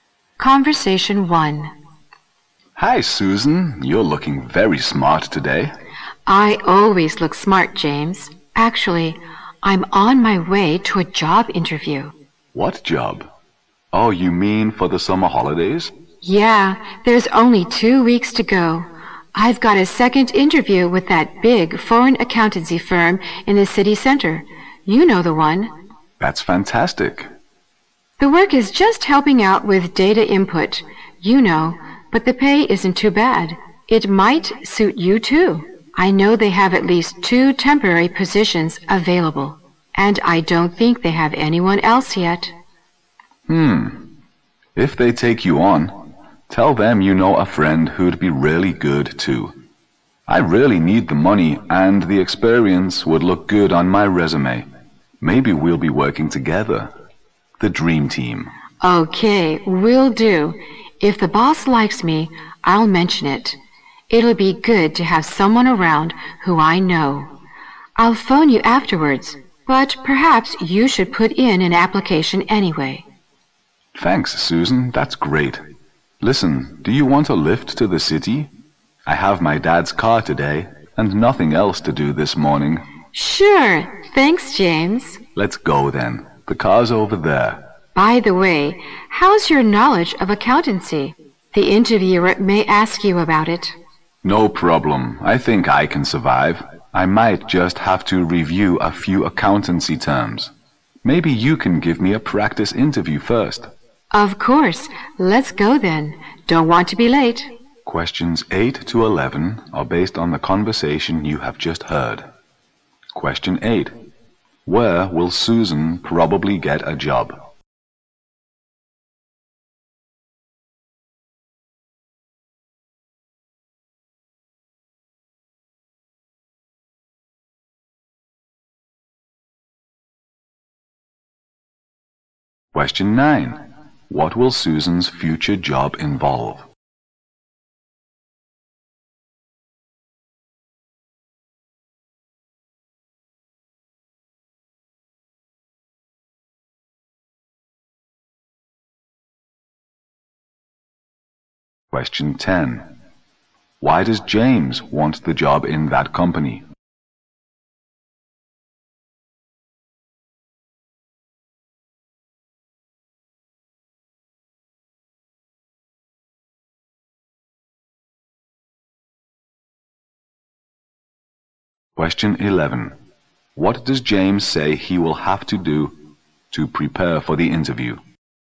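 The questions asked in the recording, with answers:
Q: Where will Susan probably get a job?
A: At a big foreign accountancy firm in the city center

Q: What will Susan's future job involve?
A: Helping out with data input

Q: Why does James want the job in that company?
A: He needs the money and the experience would look good on his resume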